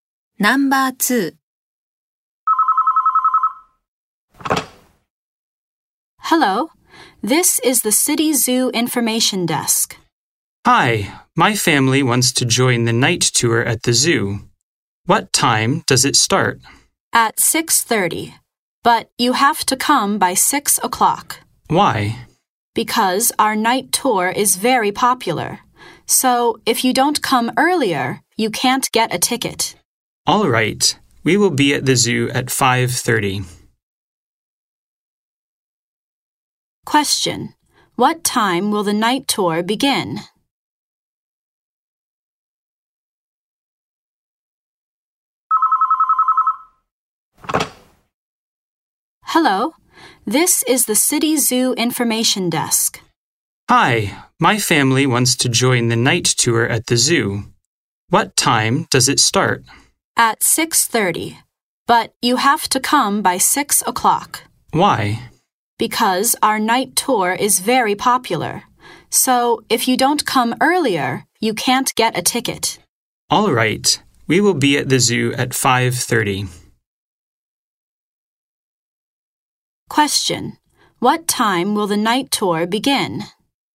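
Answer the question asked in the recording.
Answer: At 6:30.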